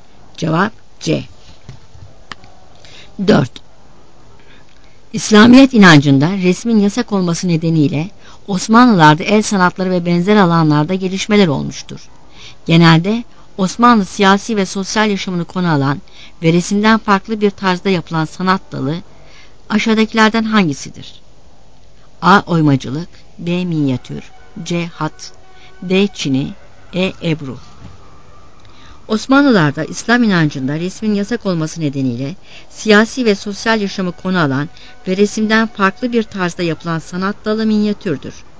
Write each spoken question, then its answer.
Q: Genelde Osmanlı siyasi ve sosyal yaşamını konu alan ve resimden farklı bir tarzda yapılan sanat dalı aşağıdakilerden hangisidir?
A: Cevap B.